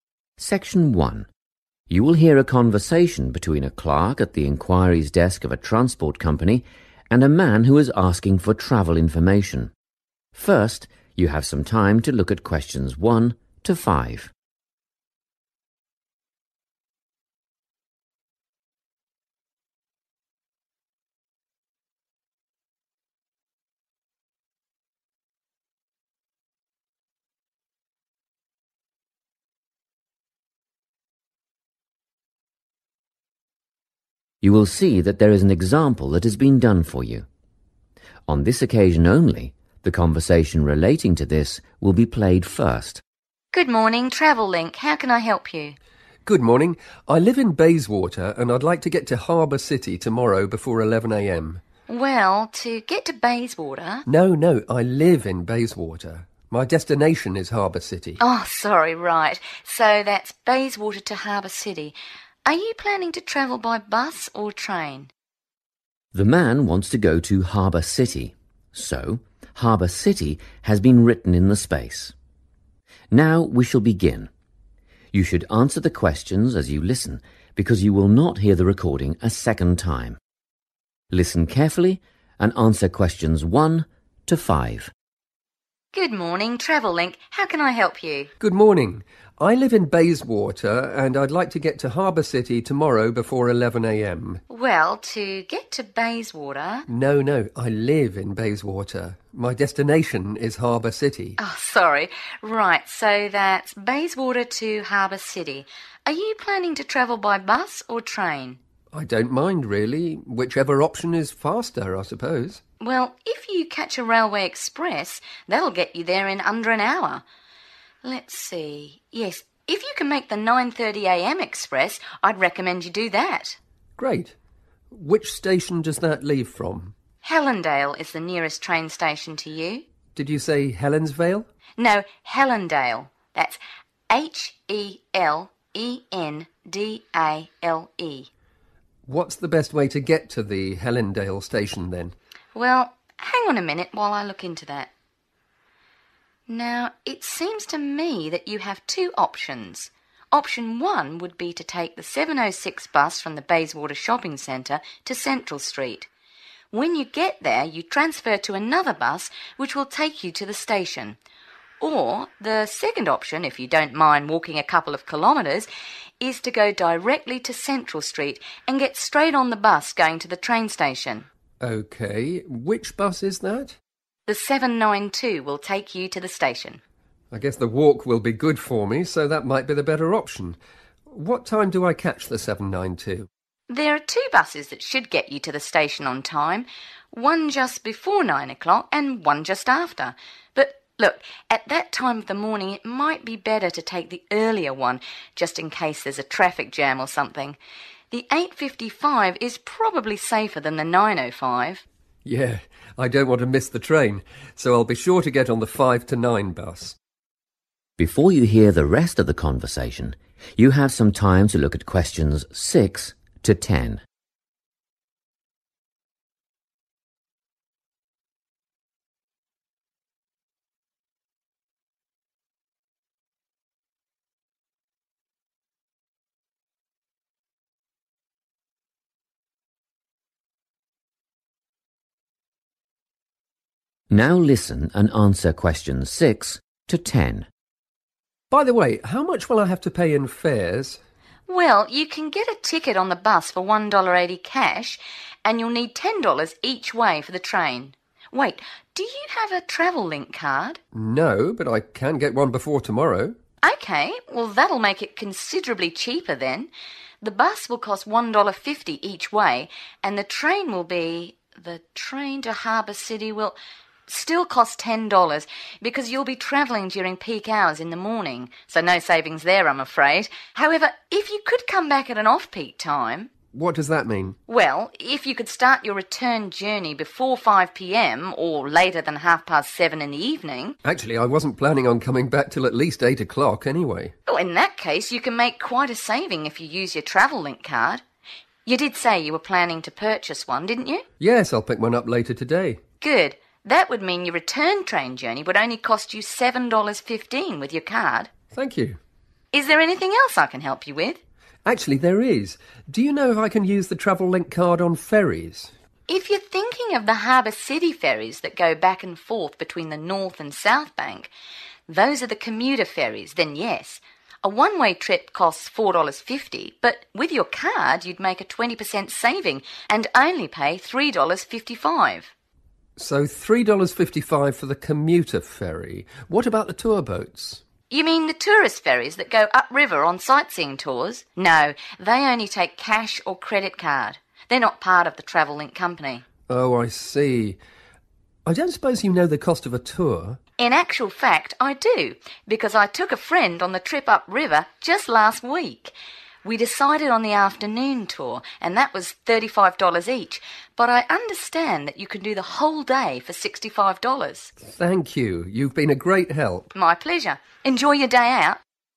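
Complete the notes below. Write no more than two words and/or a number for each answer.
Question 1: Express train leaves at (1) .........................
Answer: 9:30 a.m.

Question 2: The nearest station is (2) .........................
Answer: Hellendale

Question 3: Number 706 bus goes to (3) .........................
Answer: Central Street

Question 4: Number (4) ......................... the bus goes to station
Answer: 792

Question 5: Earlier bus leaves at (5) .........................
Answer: 8:55

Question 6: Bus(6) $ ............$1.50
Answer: 1.80

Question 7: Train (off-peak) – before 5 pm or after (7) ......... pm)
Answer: 7:30

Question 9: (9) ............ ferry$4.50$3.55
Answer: commuter

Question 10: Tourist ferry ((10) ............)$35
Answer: afternoon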